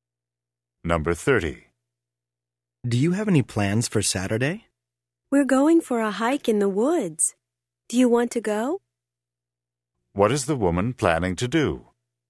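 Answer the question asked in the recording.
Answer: Go for a hike in the woods on Saturday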